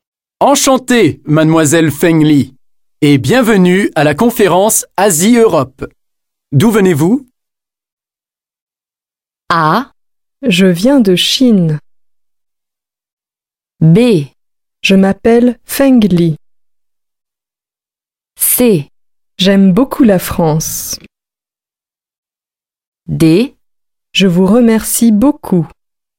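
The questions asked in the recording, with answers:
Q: D'où venez-vous ?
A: A: Je viens de Chine.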